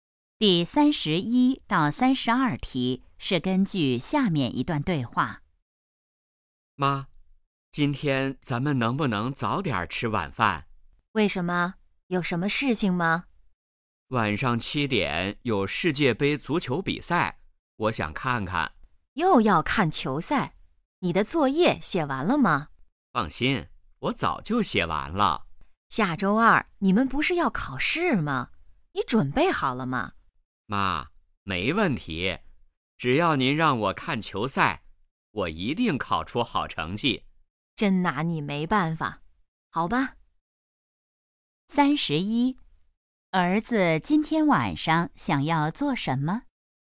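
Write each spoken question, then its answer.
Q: 儿子今天晚上想要做什么?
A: 看世界杯足球比赛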